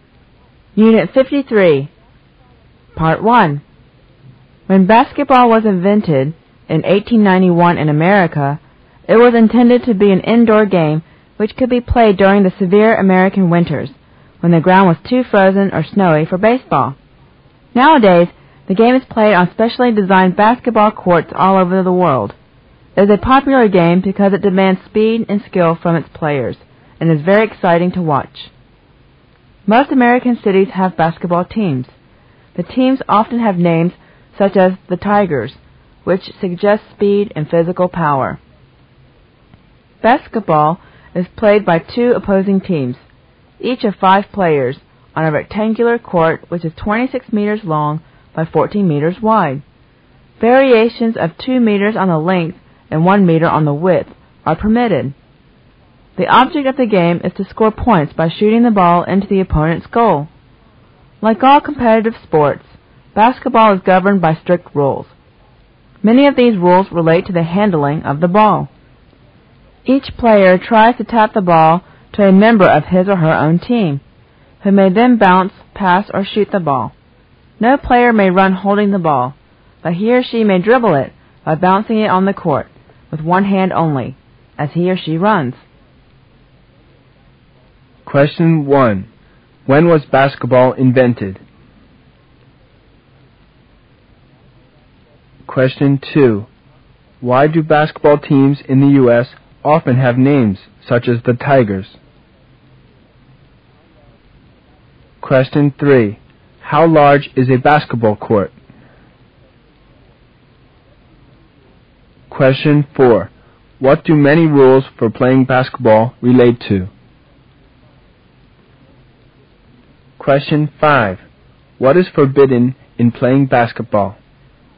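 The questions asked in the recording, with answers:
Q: When was basketball invented?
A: 1891

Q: Why do basketball teams in the U.S. often have names such as the Tigers?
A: To suggest speed and physical power

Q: How large is a basketball court?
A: 26 meters by 14 meters

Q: What do many rules for playing basketball relate to?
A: Handling the ball

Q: What is forbidden in playing basketball?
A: Running while holding the ball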